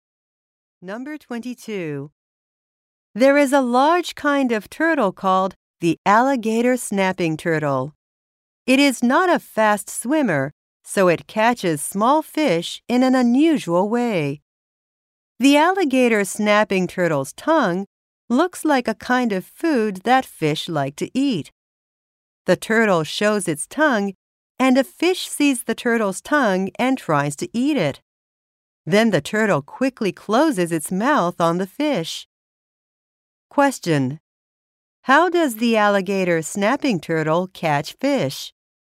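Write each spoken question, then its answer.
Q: How does the alligator snapping turtle catch fish?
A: It uses its tongue, which looks like food, to lure fish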